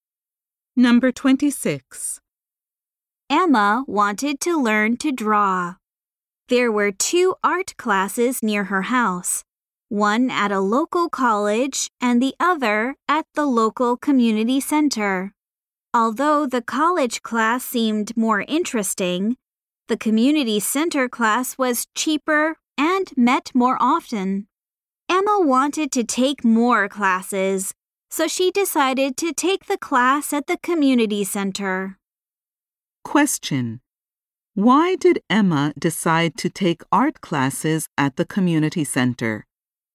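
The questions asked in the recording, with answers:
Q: Why did Emma decide to take art classes at the community center?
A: It was cheaper and met more often.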